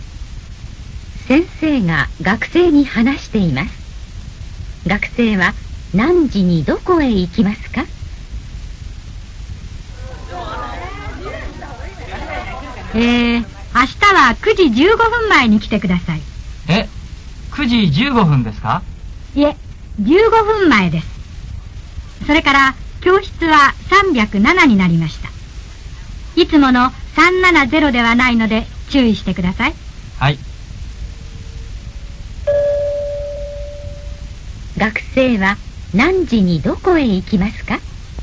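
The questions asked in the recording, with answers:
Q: 学生は何時にどこへ行きますか?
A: 8時45分に307教室へ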